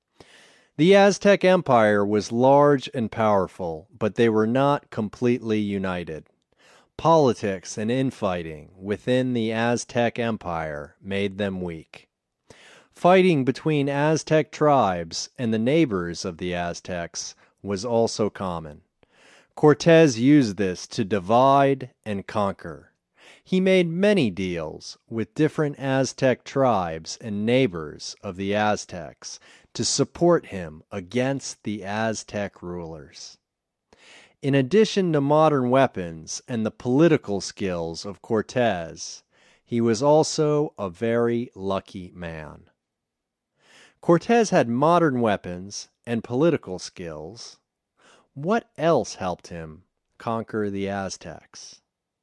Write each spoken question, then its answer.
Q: What else helped him conquer the Aztecs?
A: Luck helped him conquer the Aztecs.